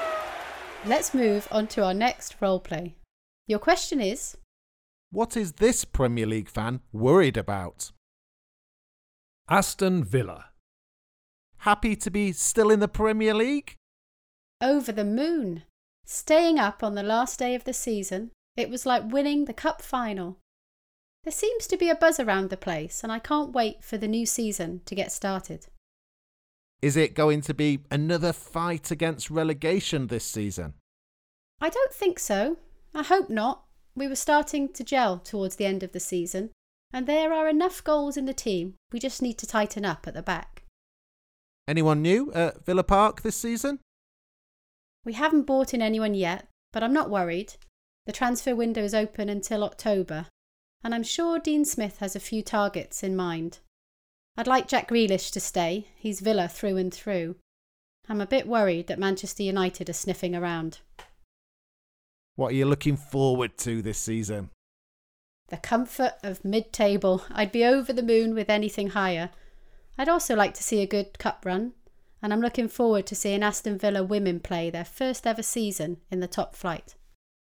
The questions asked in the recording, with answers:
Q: what is this Premier League fan worried about?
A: This Aston Villa fan, like many others I imagine, is worried about Jack Grealish leaving the club.